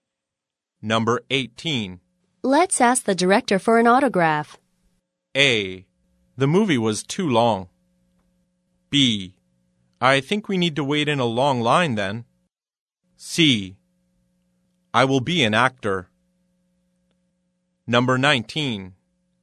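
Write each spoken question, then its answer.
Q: Let's ask the director for an autograph.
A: B: I think we need to wait in a long line then.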